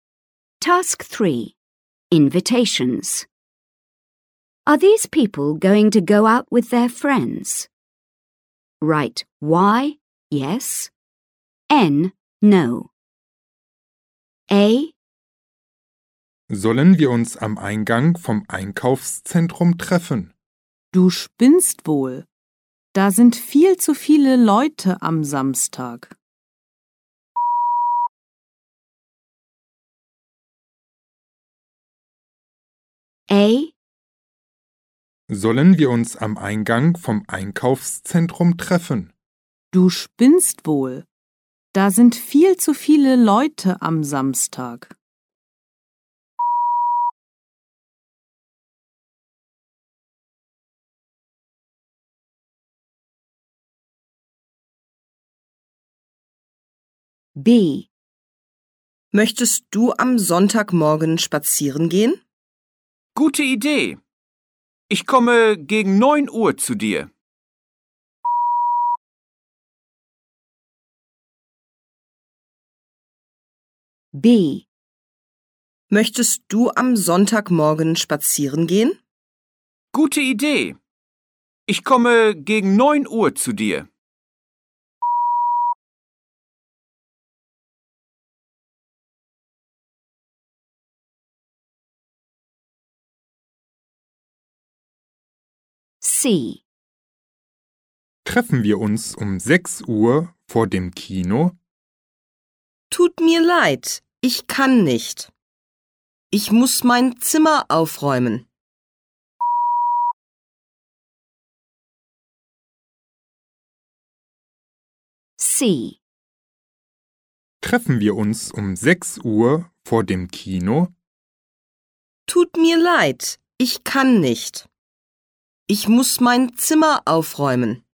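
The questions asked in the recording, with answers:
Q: Are these people going to go out with their friends?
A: N: no

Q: Are these people going to go out with their friends?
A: Y: yes

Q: Are these people going to go out with their friends?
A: N: no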